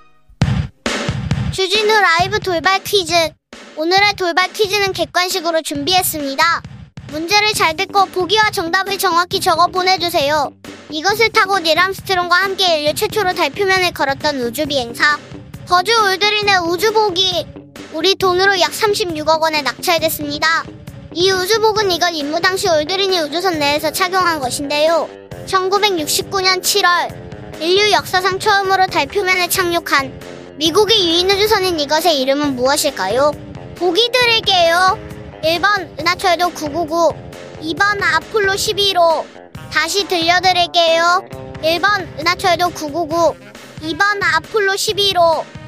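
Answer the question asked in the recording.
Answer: 2번: 아폴로 11호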